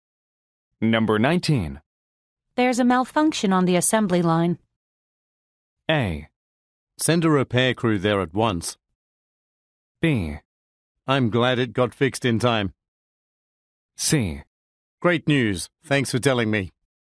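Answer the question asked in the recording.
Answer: A: Send a repair crew there at once.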